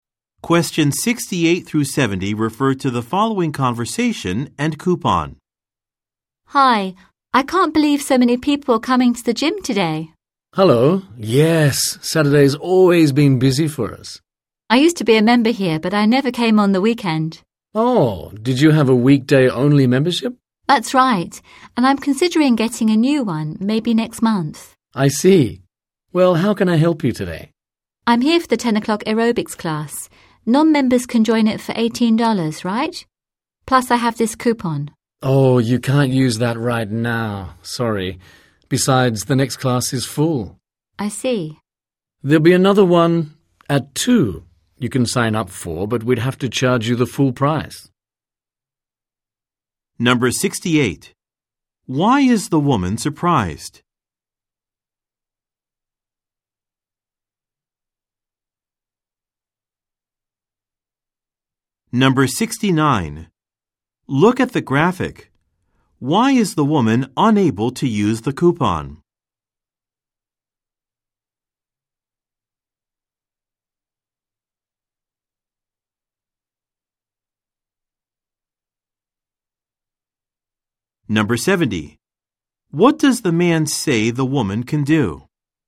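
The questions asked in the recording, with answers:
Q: Why is the woman surprised?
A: So many people are coming to the gym today.

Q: What does the man say the woman can do?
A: Sign up for another class at 2 o'clock (at full price).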